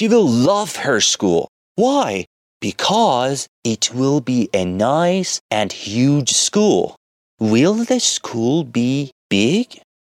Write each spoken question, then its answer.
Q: Will the school be big?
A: Yes, the school will be very big.